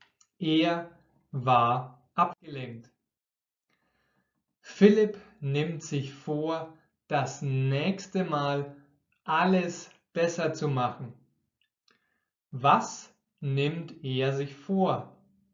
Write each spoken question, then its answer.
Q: Was nimmt er sich vor?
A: Er nimmt sich vor, alles besser zu machen.